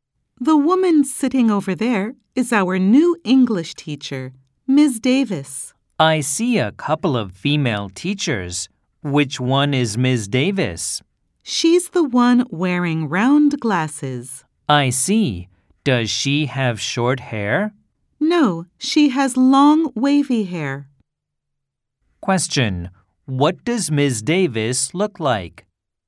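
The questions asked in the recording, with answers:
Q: What does Ms. Davis look like?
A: She wears round glasses and has long wavy hair.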